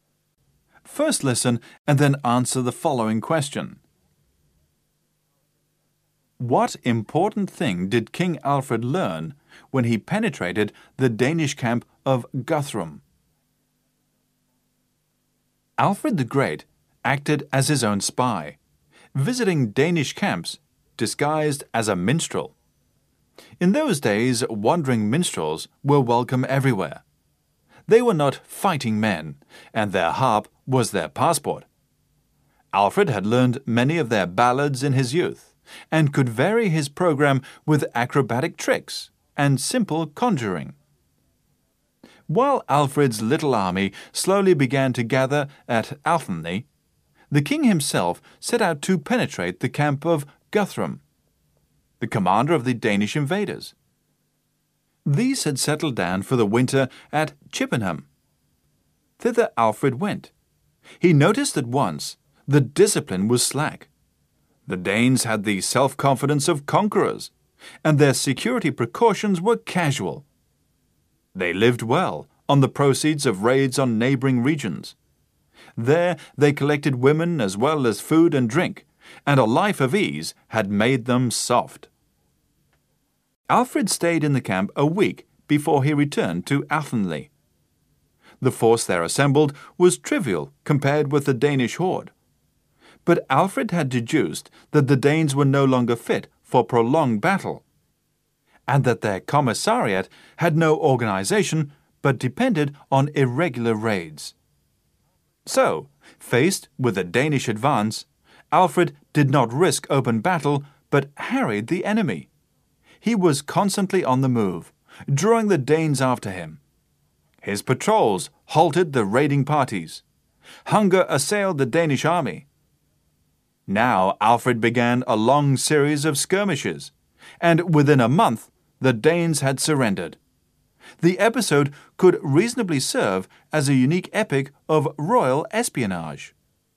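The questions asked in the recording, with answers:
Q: What important thing did King Alfred learn when he penetrated the Danish camp of Guthrum?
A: That the Danes were no longer fit for prolonged battle and their supplies depended on irregular raids, with no organization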